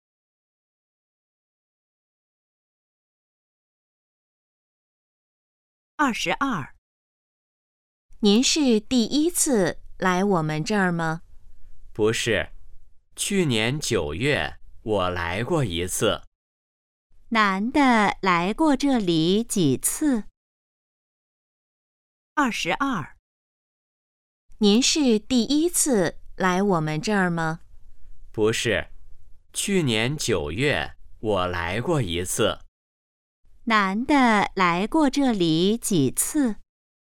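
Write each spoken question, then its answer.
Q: 男的来过这里几次?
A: 一次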